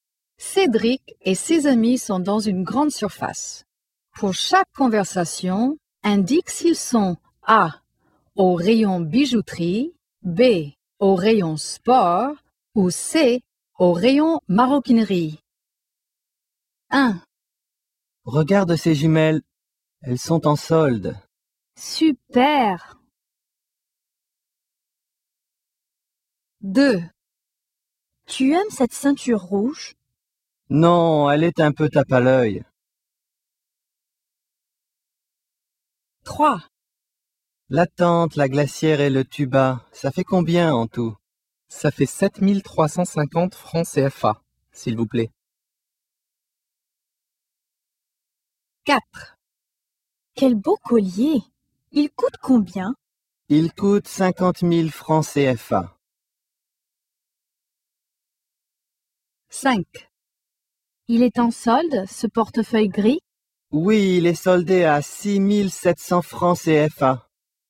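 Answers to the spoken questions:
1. B: au rayon sport
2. C: au rayon maroquinerie
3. B: au rayon sport
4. A: au rayon bijouterie
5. C: au rayon maroquinerie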